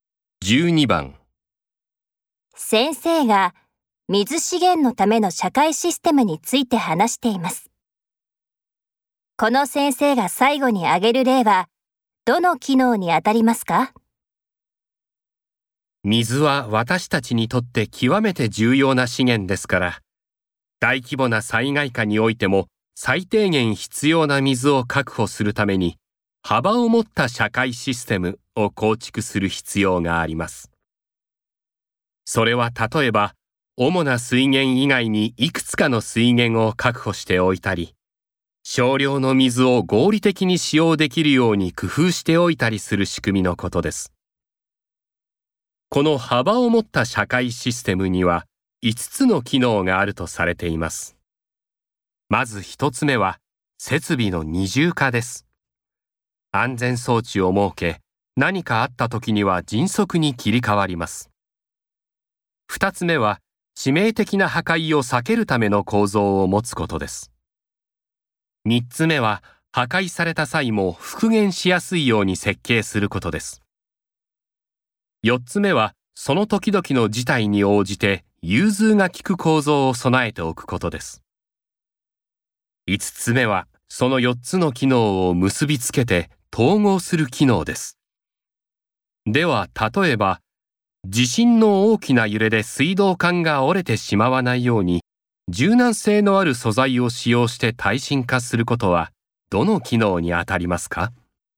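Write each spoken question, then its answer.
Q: この先生が最後に挙げる例はどの機能にあたりますか?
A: 2つ目の機能:致命的な破壊を避けるための構造を持つこと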